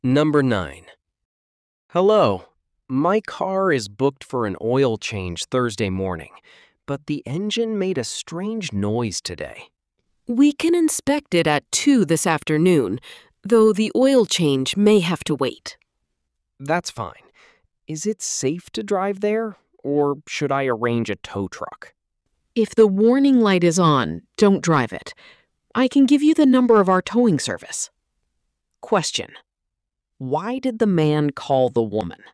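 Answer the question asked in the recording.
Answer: Because his car's engine made a strange noise and he wants it checked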